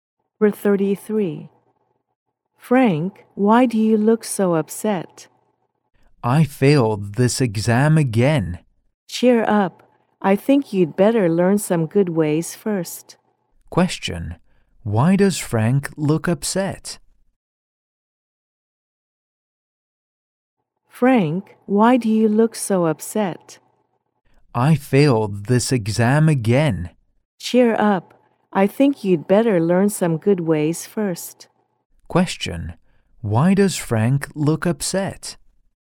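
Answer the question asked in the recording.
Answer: He failed the exam again.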